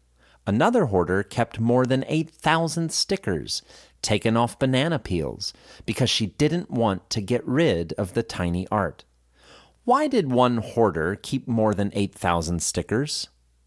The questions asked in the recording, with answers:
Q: Why did one hoarder keep more than 8,000 stickers?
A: One hoarder kept more than 8,000 stickers because she didn't want to get rid of the tiny art.